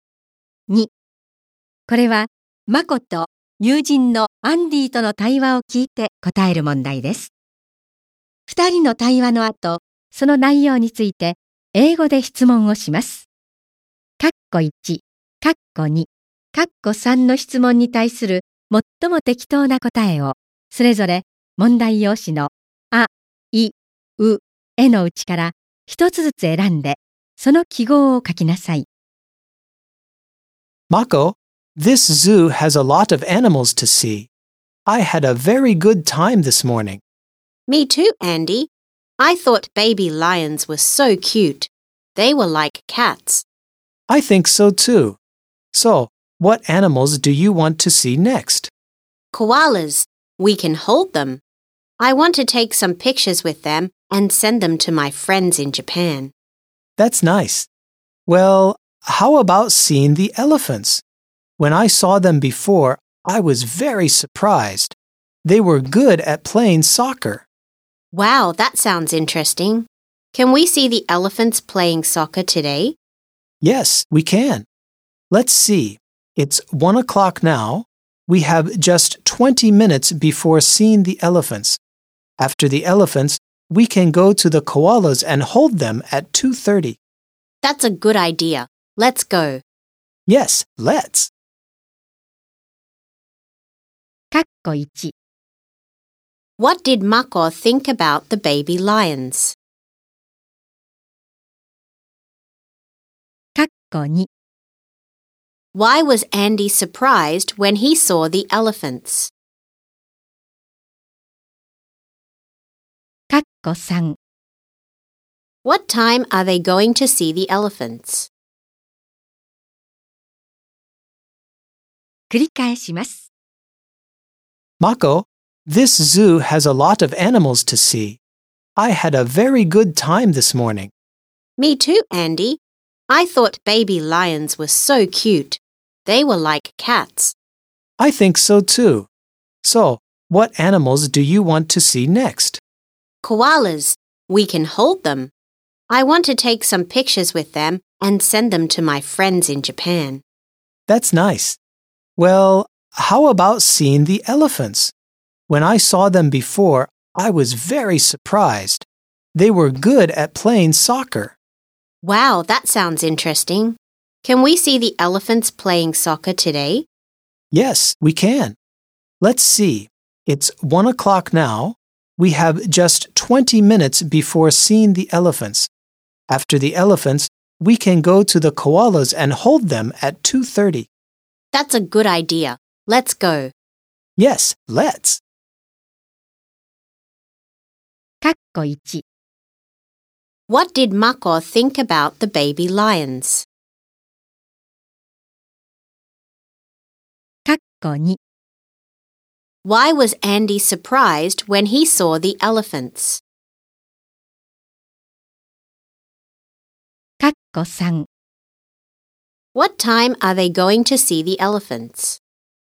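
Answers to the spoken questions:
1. She thought they were so cute, like cats.
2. Because they were good at playing soccer.
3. At 1:20.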